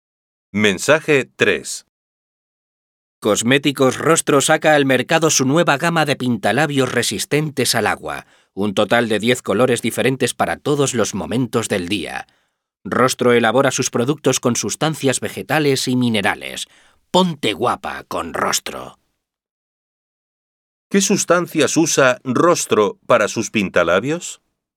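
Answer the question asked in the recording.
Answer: Sustancias vegetales y minerales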